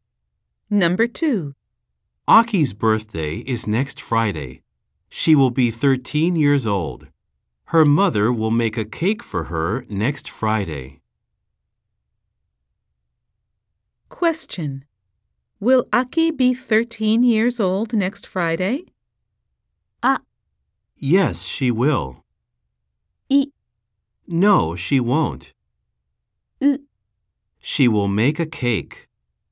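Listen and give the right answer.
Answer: ア: Yes, she will.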